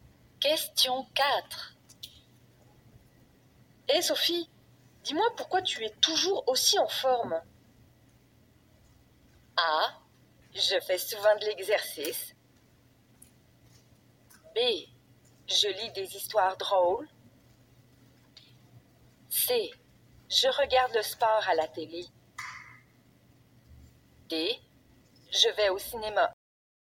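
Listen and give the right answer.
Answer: A: Je fais souvent de l'exercice.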